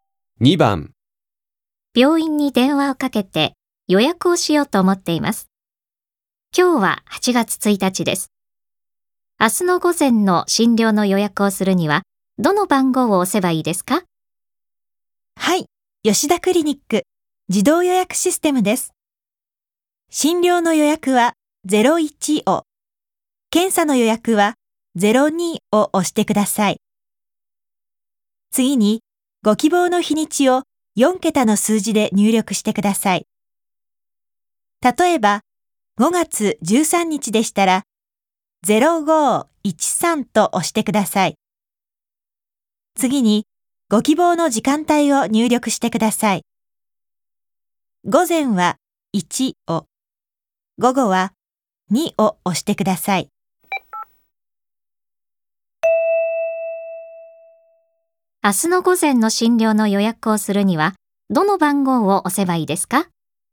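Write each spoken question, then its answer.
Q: 明日の午前の診療の予約をするには、どの番号を押せばいいですか?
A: 01、0802、1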